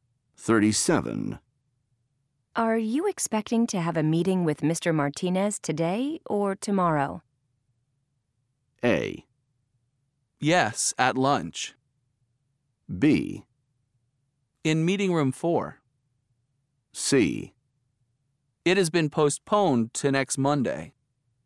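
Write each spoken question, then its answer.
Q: Are you expecting to have a meeting with Mr. Martinez today or tomorrow?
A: C: It has been postponed to next Monday.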